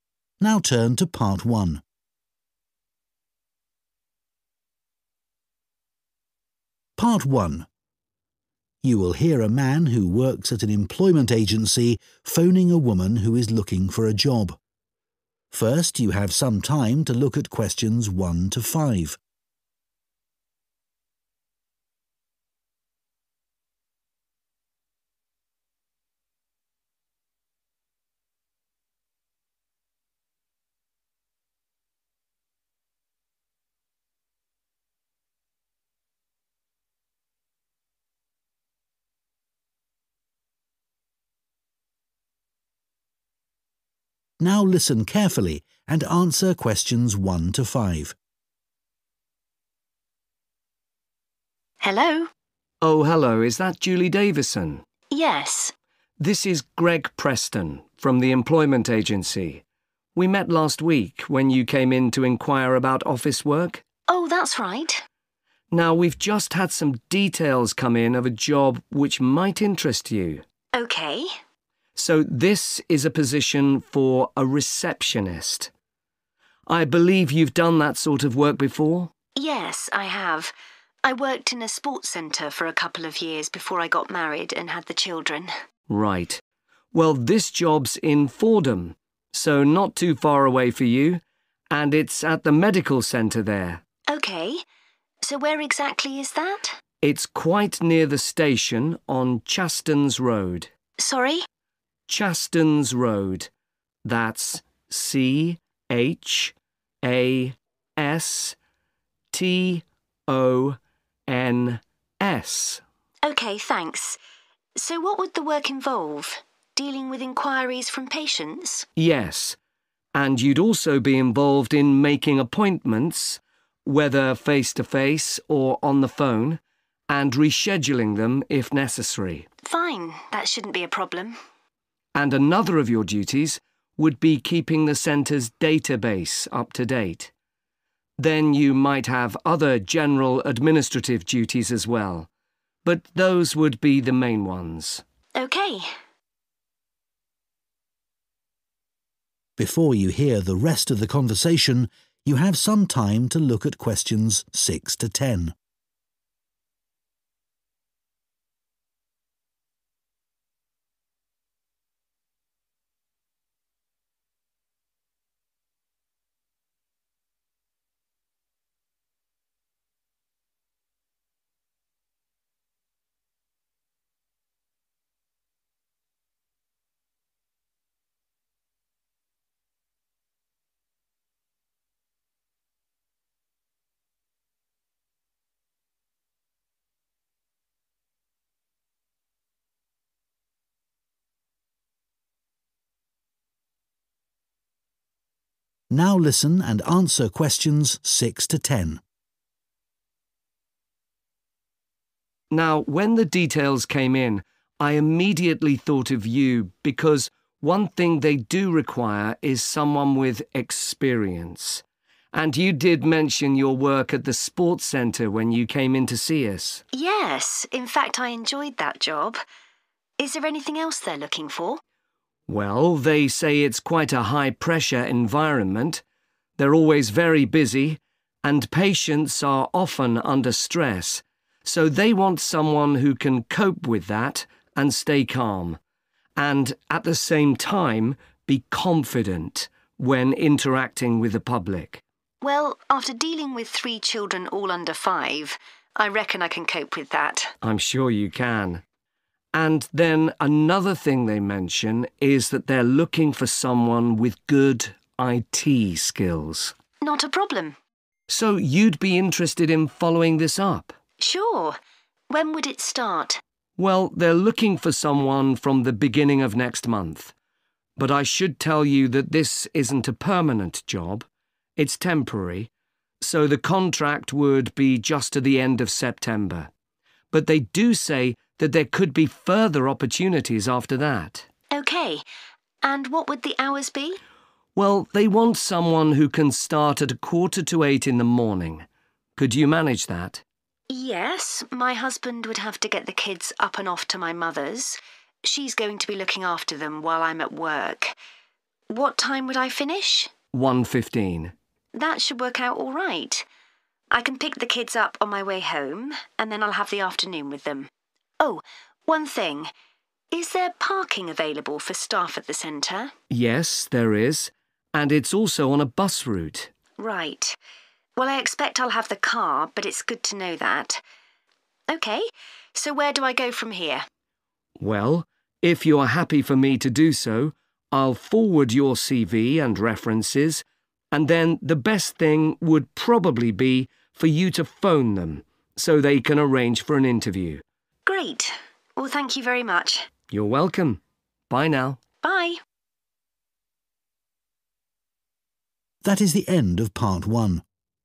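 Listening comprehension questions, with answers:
Complete the notes below.Write ONE WORD AND/OR A NUMBER for each answer.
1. Role 1 .....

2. Location Fordham 2 ....... Centre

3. 3 ..... Road, Fordham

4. making 4 ....... and reorganising them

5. maintaining the internal 5 ...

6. 6 ....... (essential)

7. a calm and 7 ..... manner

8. a 8 ...... job - further opportunities may be available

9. hours: 7.45 a.m. to 9 ..... p.m. Monday to Friday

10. 10 ...... is available onsite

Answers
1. receptionist
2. Medical
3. Chastons
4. appointments
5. database
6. experience
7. confident
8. temporary
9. 1.15
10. parking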